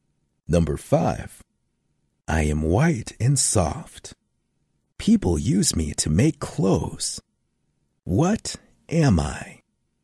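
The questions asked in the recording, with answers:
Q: What am I?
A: cotton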